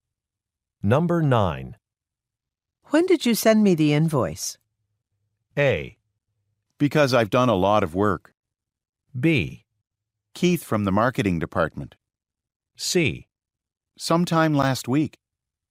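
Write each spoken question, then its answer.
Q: When did you send me the invoice?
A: C: Sometime last week.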